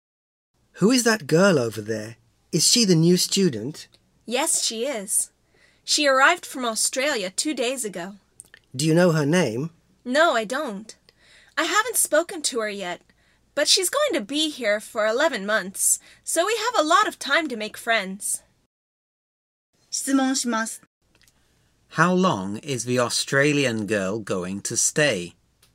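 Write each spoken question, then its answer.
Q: How long is the Australian girl going to stay?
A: For 11 months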